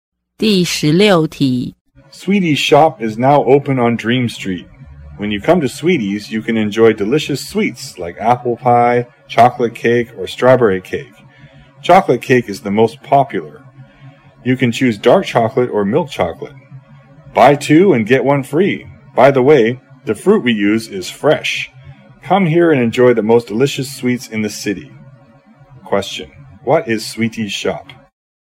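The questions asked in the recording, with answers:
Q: What is Sweetie's shop?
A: A dessert shop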